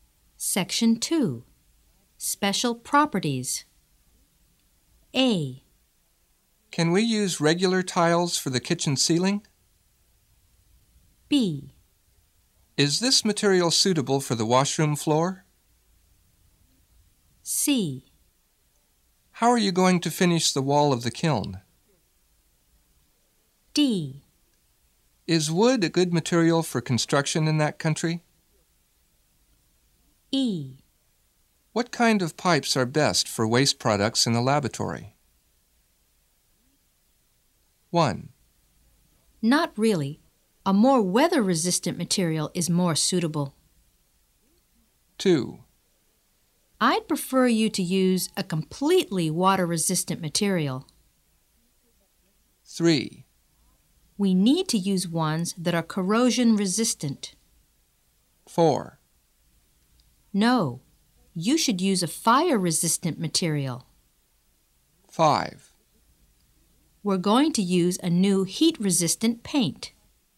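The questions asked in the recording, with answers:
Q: Not really. A more weather-resistant material is more suitable.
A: D: Is wood a good material for construction in that country?

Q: I'd prefer you to use a completely water-resistant material.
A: B: Is this material suitable for the washroom floor?

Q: We need to use ones that are corrosion-resistant.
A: E: What kind of pipes are best for waste products in the laboratory?

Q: No, you should use a fire-resistant material.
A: A: Can we use regular tiles for the kitchen ceiling?

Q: We're going to use a new heat-resistant paint.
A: C: How are you going to finish the wall of the kiln?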